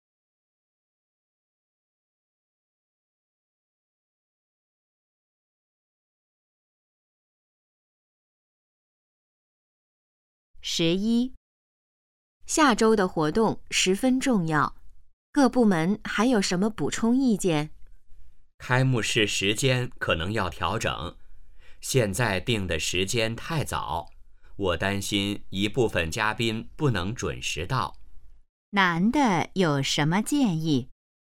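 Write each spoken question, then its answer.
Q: 男的有什么建议?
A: 调整开幕式时间,别定得太早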